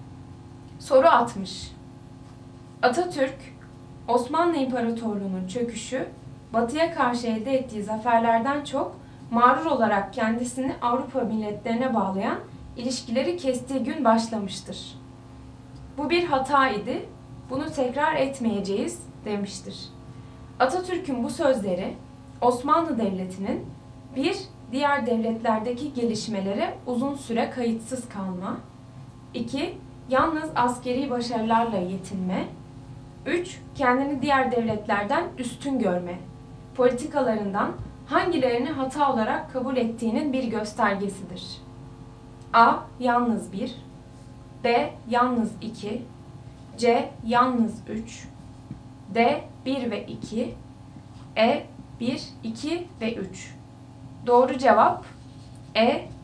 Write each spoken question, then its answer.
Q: Politikalarından hangilerini hata olarak kabul ettiğinin bir göstergesidir.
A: Doğru cevap E. 1 ve 2 ve 3.